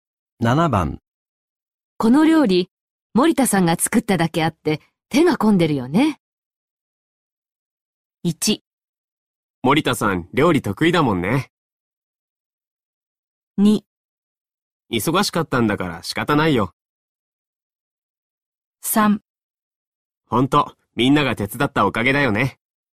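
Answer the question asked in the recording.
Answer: 1: 森田さん、料理得意だもんね。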